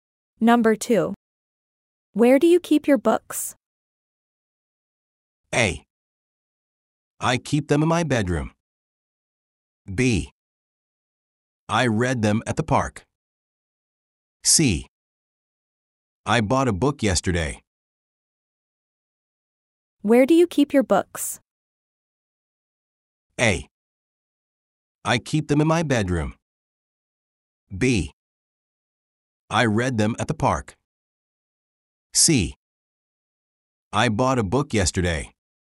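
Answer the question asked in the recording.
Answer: A: I keep them in my bedroom.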